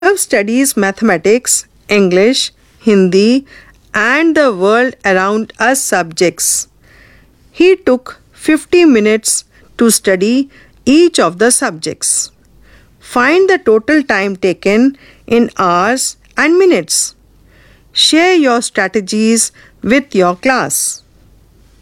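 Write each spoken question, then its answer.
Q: Find the total time taken in hours and minutes.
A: 3 hours 20 minutes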